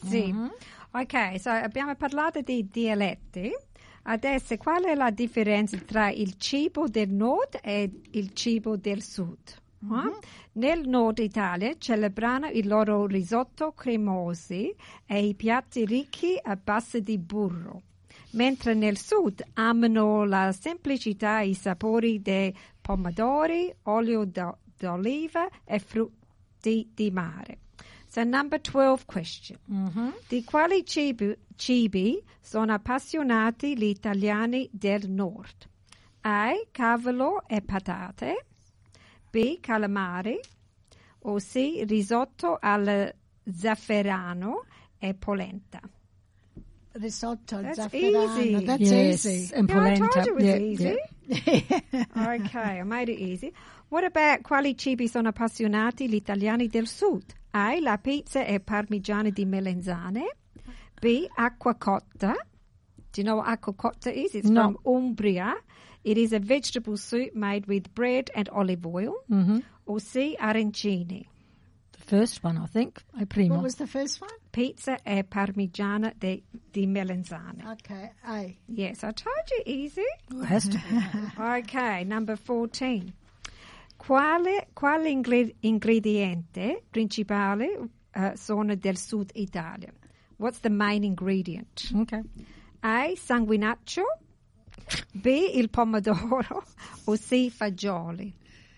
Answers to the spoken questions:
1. Risotto al
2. Okay, A.
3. It's pomodoro.